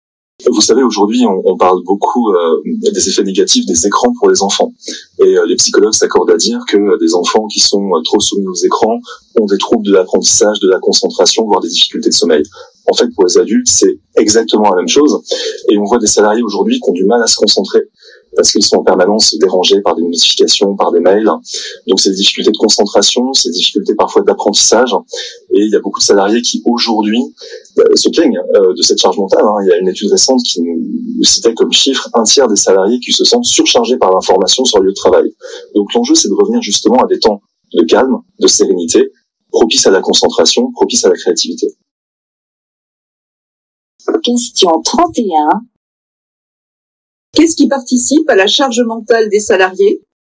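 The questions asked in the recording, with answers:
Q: Qu'est-ce qui participe à la charge mentale des salariés ?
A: Les notifications et les mails qui les dérangent en permanence (surcharge d'information)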